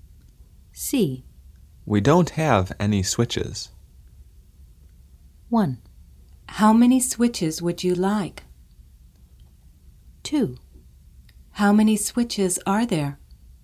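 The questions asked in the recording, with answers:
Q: We don't have any switches.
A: 2: How many switches are there?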